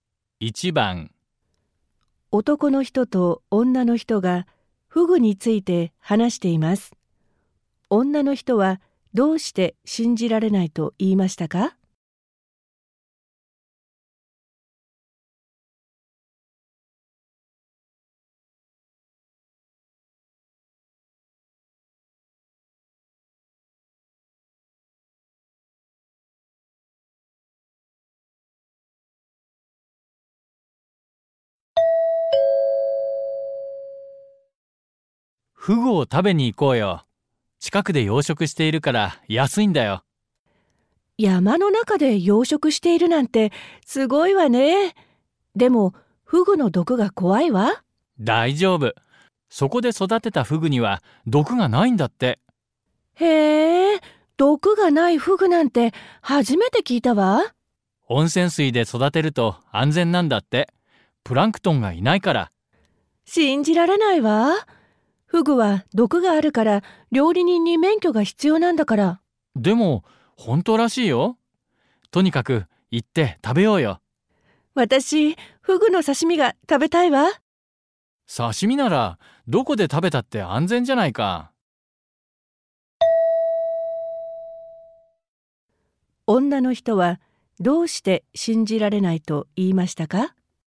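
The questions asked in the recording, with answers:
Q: 女の人はどうして信じられないと言いましたか?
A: フグには毒があるので(料理人に免許が必要なのに)、毒がないフグがいるとは思えないから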